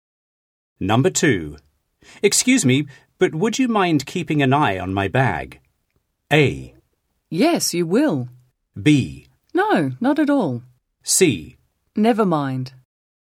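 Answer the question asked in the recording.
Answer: B: No, not at all.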